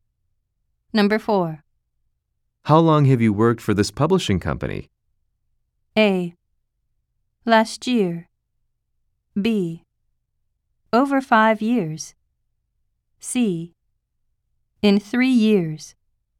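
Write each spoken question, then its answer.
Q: How long have you worked for this publishing company?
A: B: Over 5 years.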